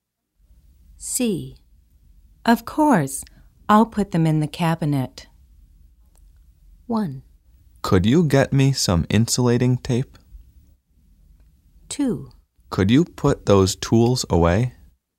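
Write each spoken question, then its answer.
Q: Of course, I'll put them in the cabinet.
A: 2: Could you put those tools away?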